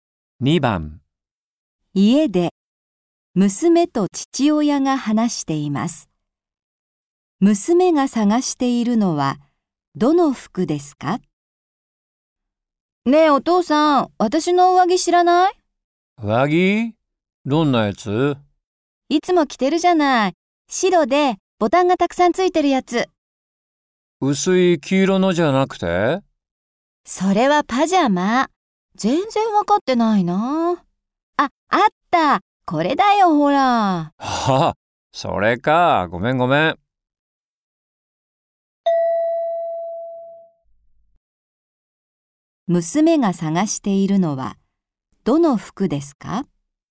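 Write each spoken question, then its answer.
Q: 娘が探しているのはどの服ですか?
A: 白でボタンがたくさんついている上着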